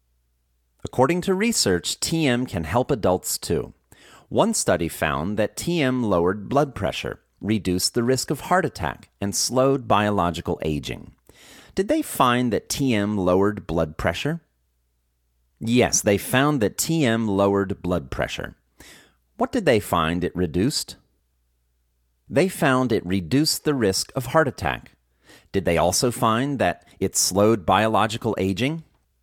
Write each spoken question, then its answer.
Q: Did they find that TM lowered blood pressure?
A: Yes, they found that TM lowered blood pressure.

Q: Did they also find that it slowed biological aging?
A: Yes, they found that it also slowed biological aging.